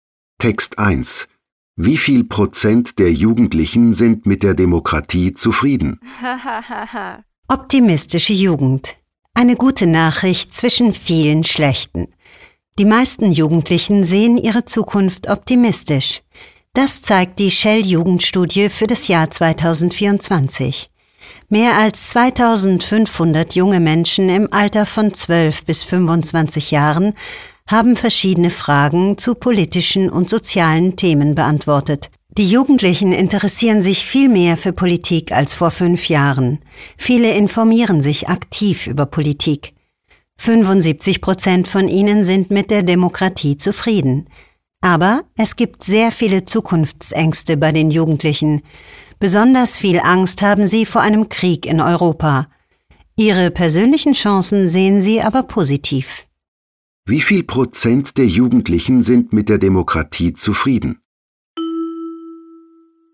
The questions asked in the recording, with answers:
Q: Wie viel Prozent der Jugendlichen sind mit der Demokratie zufrieden?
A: 75% der Jugendlichen, die an der Studie teilgenommen haben, sind mit der Demokratie zufrieden.